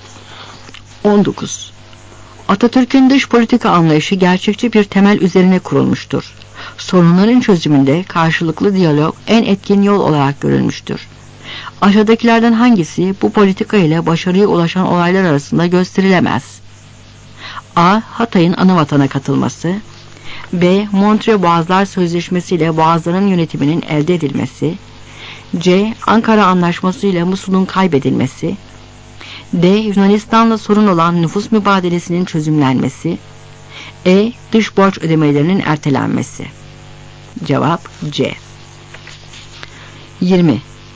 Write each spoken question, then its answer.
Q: Aşağıdakilerden hangisi bu politika ile başarıya ulaşan olaylar arasında gösterilemez?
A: Cevap C.